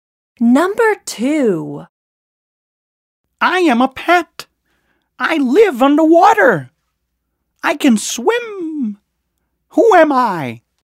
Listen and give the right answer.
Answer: I am the fish.